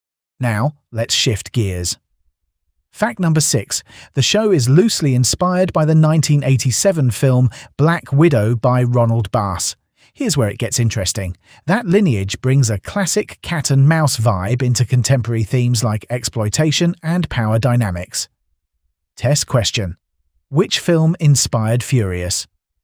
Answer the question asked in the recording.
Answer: Black Widow.